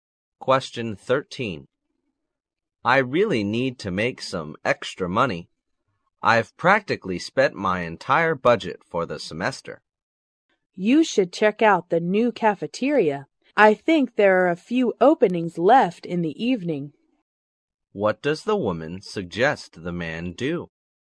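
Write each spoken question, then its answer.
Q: What does the woman suggest the man do?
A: Look for an evening job at the new cafeteria.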